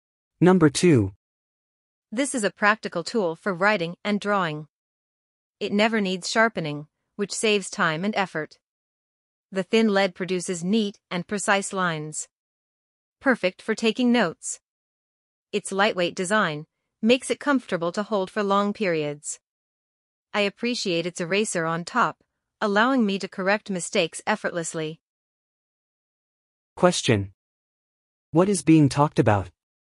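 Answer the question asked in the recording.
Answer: A mechanical pencil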